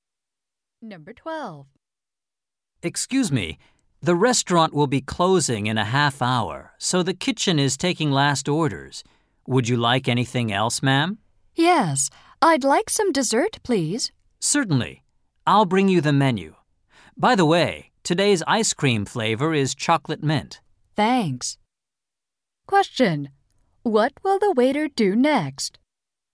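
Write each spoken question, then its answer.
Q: What will the waiter do next?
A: Bring the woman the dessert menu.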